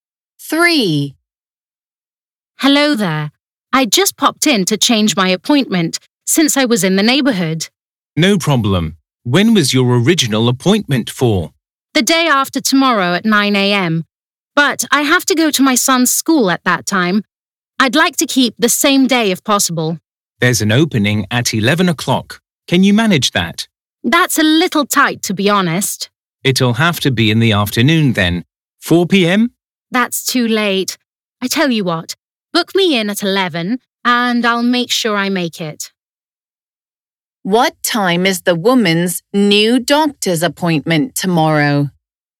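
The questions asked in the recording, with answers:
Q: What time is the woman's new doctor's appointment tomorrow?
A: 11 o'clock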